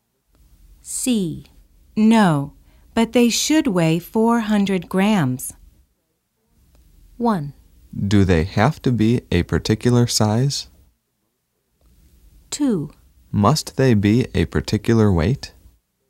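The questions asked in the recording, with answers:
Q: No, but they should weigh 400 grams.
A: 1: Do they have to be a particular size?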